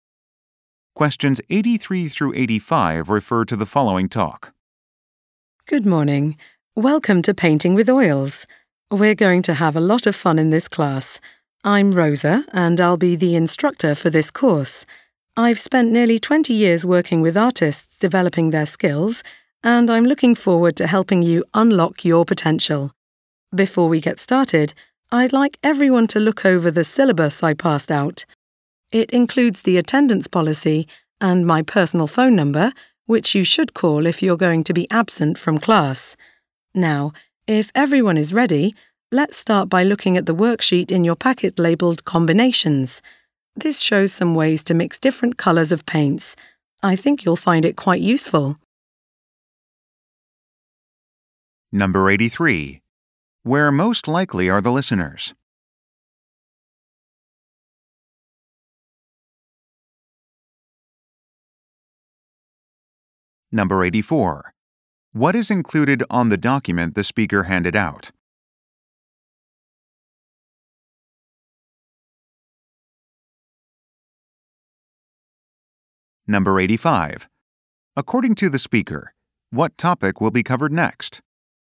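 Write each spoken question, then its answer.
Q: Where most likely are the listeners?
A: In an oil painting class

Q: What is included on the document the speaker handed out?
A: The attendance policy and the instructor's phone number

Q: According to the speaker, what topic will be covered next?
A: Ways to mix paint colours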